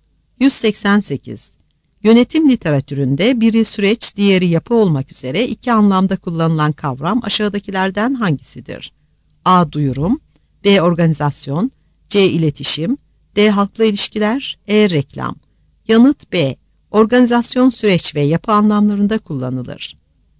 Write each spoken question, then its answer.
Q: Yönetim literatüründe biri süreç, diğeri yapı olmak üzere iki anlamda kullanılan kavram aşağıdakilerden hangisidir?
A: Yanıt B.